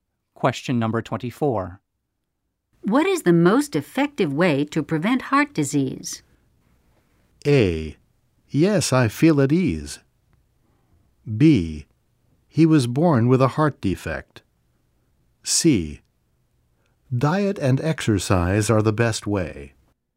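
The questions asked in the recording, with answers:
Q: What is the most effective way to prevent heart disease?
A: C: Diet and exercise are the best way.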